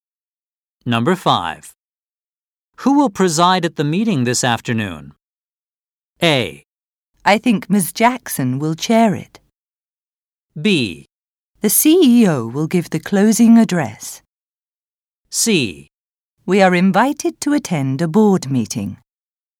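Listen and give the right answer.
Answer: A: I think Ms. Jackson will chair it.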